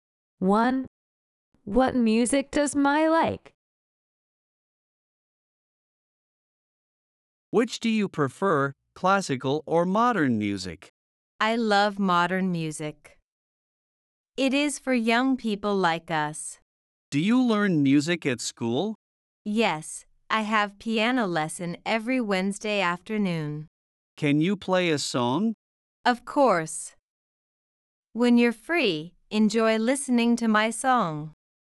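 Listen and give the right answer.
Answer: Modern music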